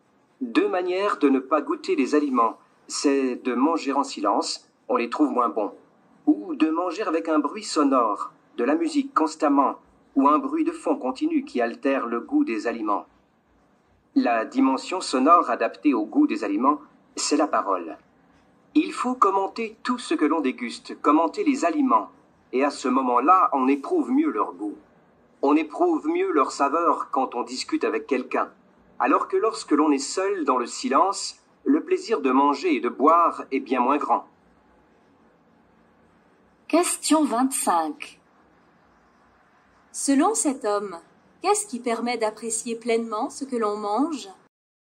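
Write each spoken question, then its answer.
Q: Selon cet homme, qu'est-ce qui permet d'apprécier pleinement ce que l'on mange ?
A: Parler, commenter les aliments en discutant avec quelqu'un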